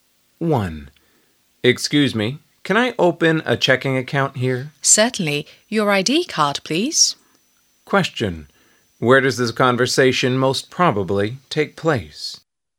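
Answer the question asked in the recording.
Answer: At a bank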